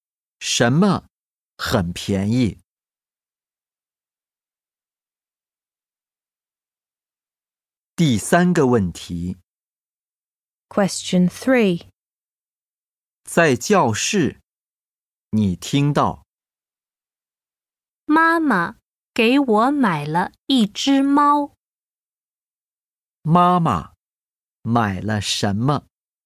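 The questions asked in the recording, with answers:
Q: 妈妈买了什么?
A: 一只猫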